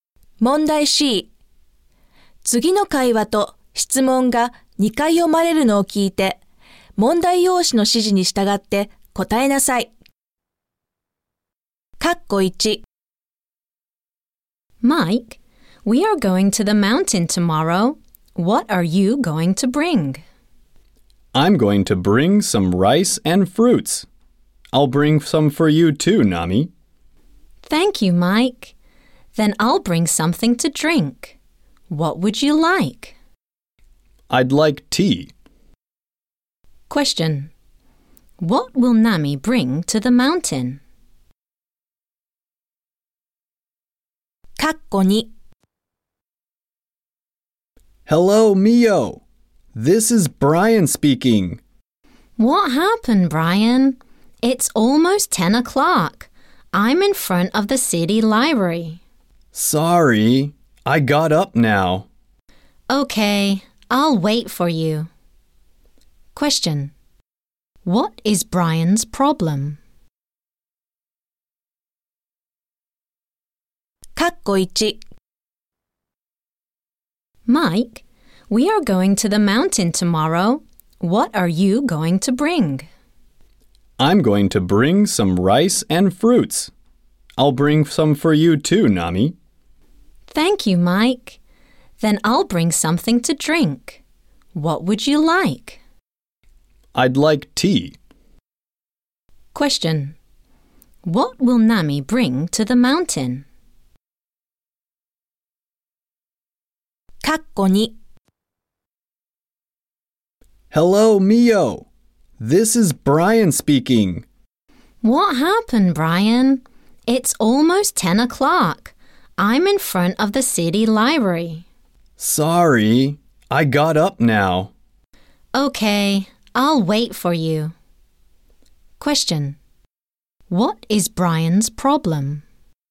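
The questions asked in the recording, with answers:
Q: What will Nami bring to the mountain?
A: Something to drink (tea)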